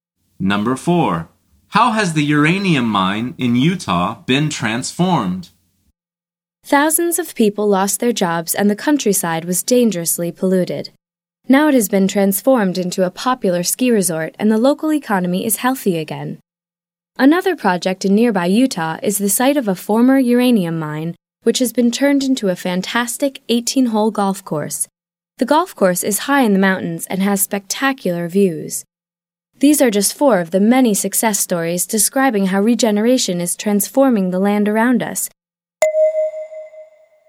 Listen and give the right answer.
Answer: The answer is it's now a golf course.